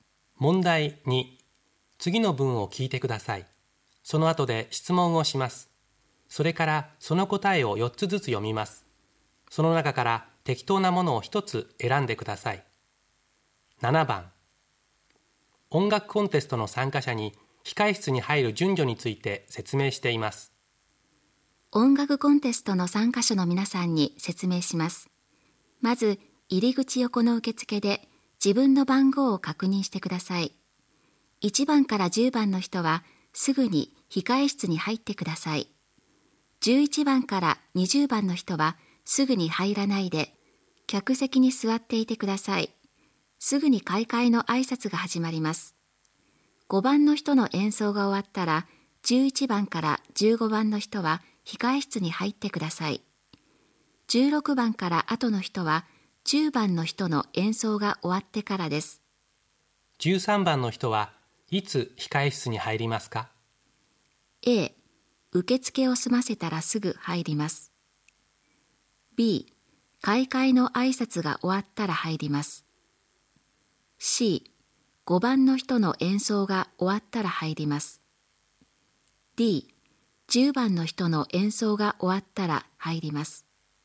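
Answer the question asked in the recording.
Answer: C: 5番の人の演奏が終わったら入ります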